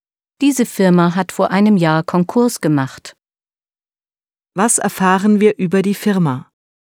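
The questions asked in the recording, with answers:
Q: Was erfahren wir über die Firma?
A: Sie hat vor einem Jahr Konkurs gemacht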